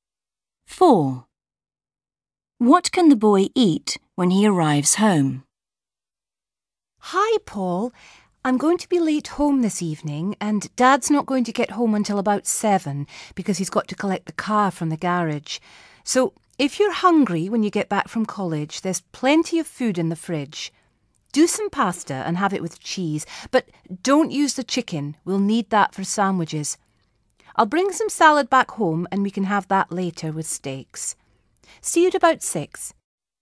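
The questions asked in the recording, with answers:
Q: What can the boy eat when he arrives home?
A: pasta with cheese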